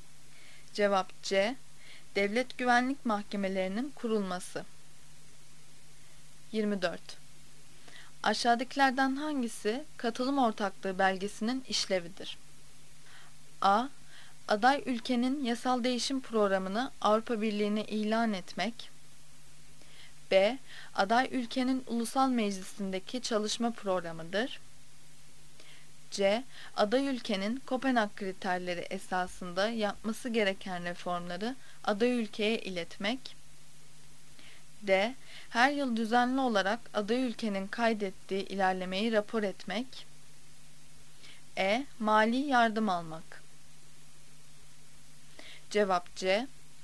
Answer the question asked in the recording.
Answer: Cevap C. Aday ülkenin Kopenhag kriterleri esasında yapması gereken reformları aday ülkeye iletmek.